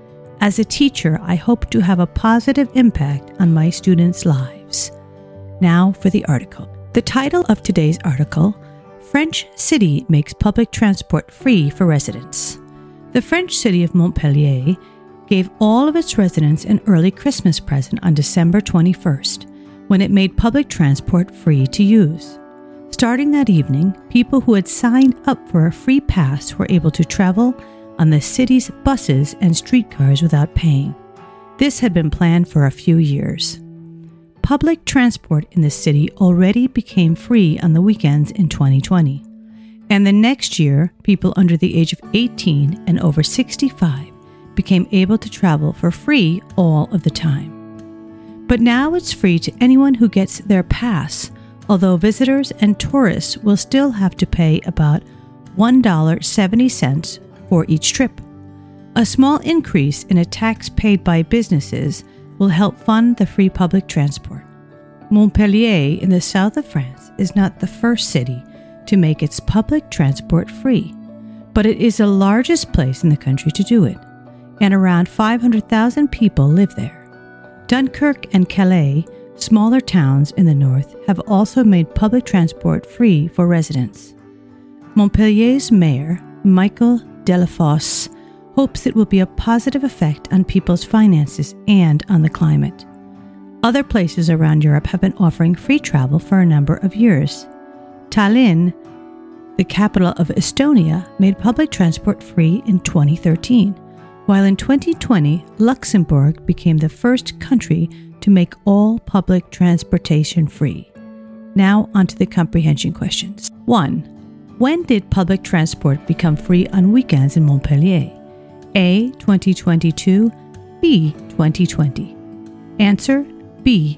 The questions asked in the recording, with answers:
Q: When did public transport become free on weekends in Montpellier?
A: Answer, B. 2020.